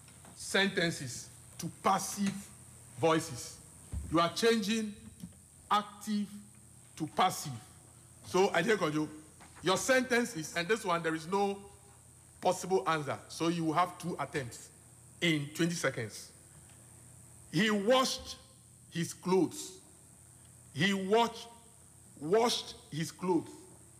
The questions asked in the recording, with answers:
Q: He washed his clothes. He washed his clothes.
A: So the clothes were washed by him.